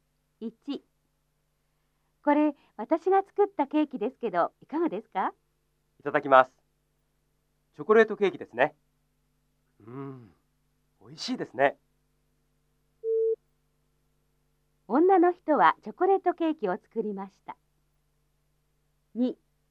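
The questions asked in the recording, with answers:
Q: 女の人はチョコレートケーキを作りました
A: 正しい(○)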